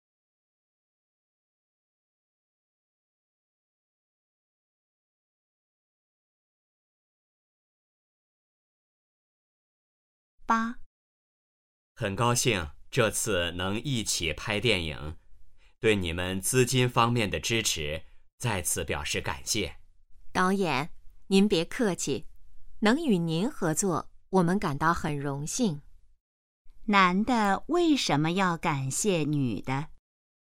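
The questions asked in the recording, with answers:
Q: 男的为什么要感谢女的?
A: 女的在资金方面给予支持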